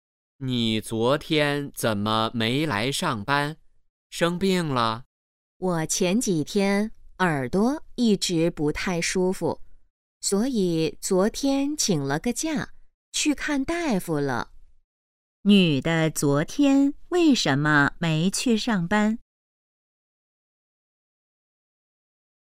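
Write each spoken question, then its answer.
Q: 女的昨天为什么没去上班?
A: 耳朵不舒服,去看大夫了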